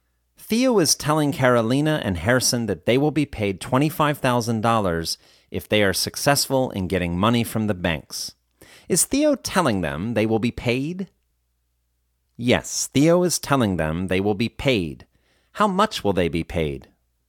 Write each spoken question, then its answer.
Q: How much will they be paid?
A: They will be paid $25,000.